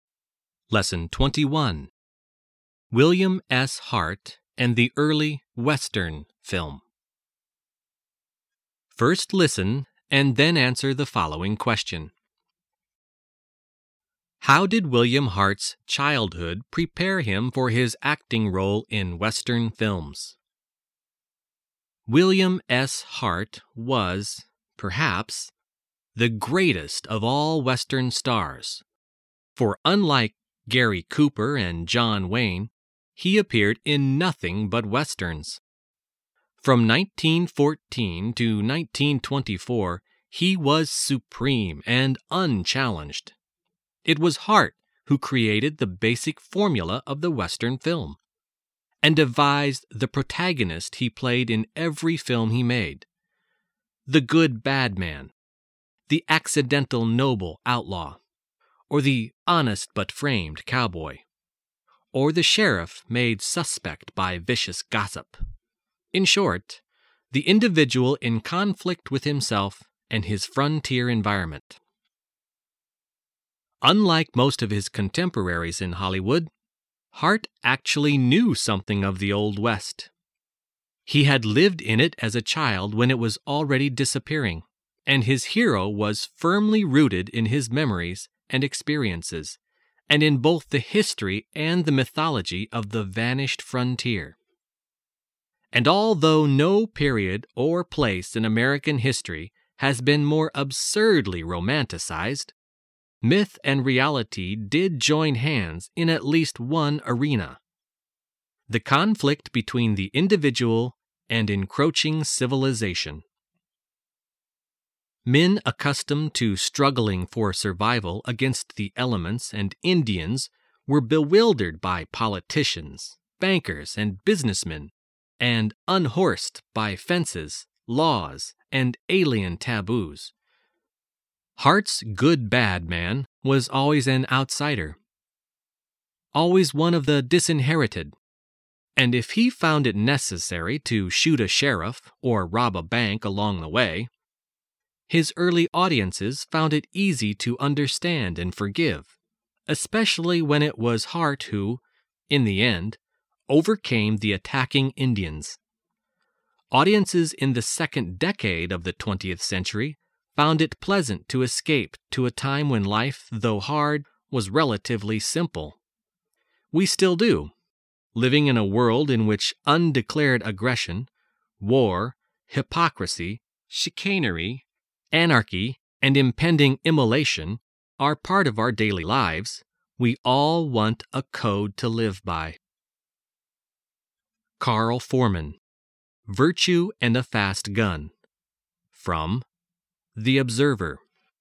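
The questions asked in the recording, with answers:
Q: How did William Hart's childhood prepare him for his acting role in Western films?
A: He lived in the Old West as a child, so his hero was rooted in his own memories and experiences of the vanishing frontier.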